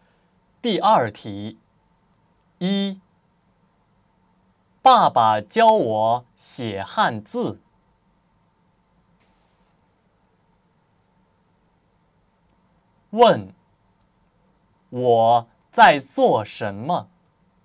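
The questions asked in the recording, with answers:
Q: 问,我在做什么?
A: 学写汉字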